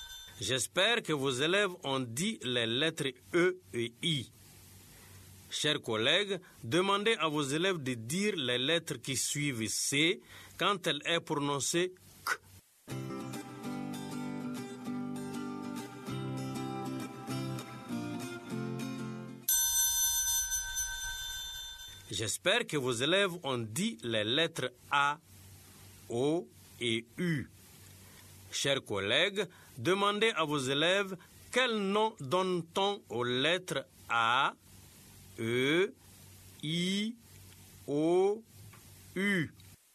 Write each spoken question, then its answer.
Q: Quel nom donne-t-on aux lettres A, E, I, O, U?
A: Monsieur, A, E, I, O, U sont les voyelles.